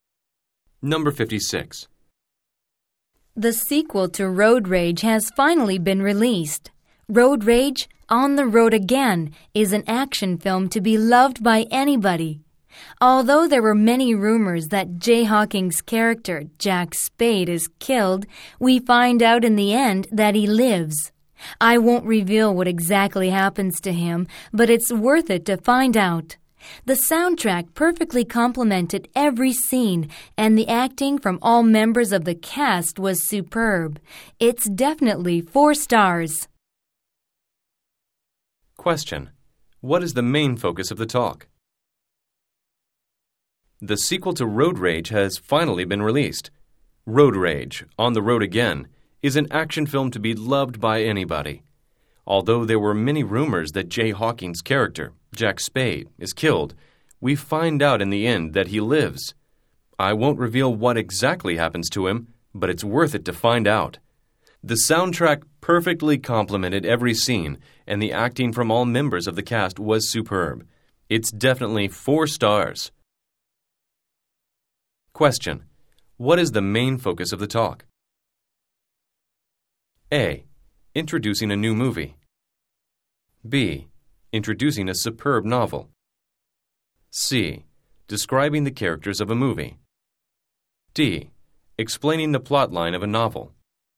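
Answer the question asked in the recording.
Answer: A: Introducing a new movie.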